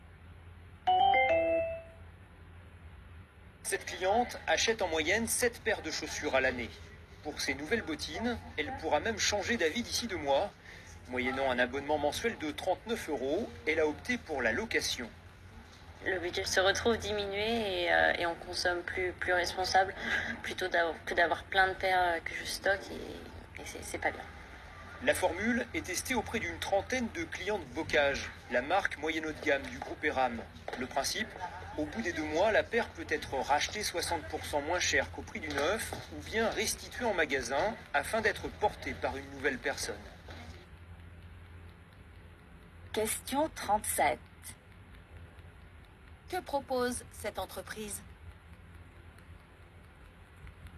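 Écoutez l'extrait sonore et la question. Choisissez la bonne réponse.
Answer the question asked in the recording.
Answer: La location de chaussures par abonnement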